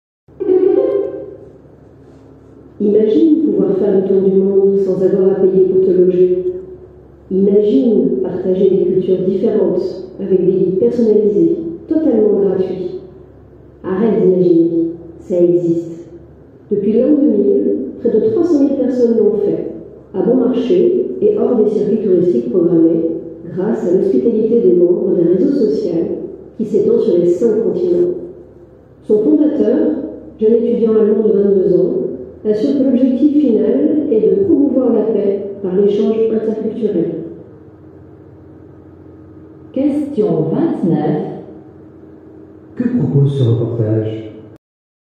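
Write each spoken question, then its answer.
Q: Que propose ce reportage?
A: Voyager en étant logé gratuitement chez des membres d'un réseau social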